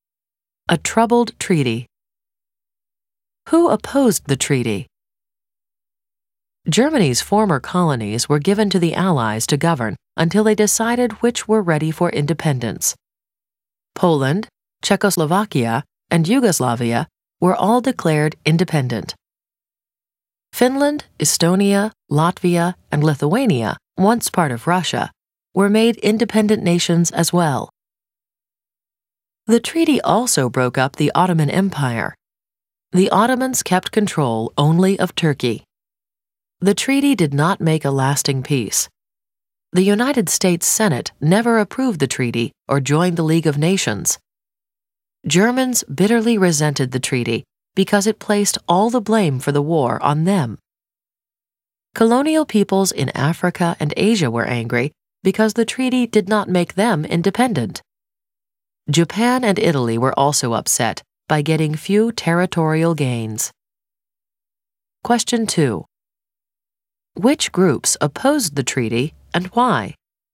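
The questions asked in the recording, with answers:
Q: Which groups opposed the treaty and why?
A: The U.S. Senate never approved it. Germans resented getting all the blame. Colonial peoples in Africa and Asia were angry that they did not get independence. Japan and Italy were upset about their small territorial gains.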